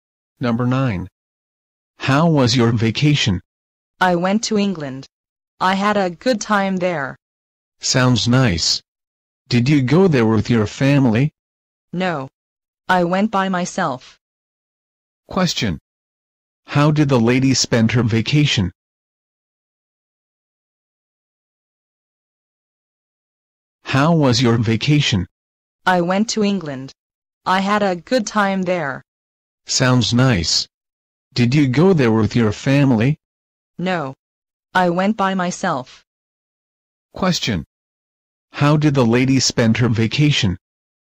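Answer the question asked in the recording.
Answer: She traveled to England by herself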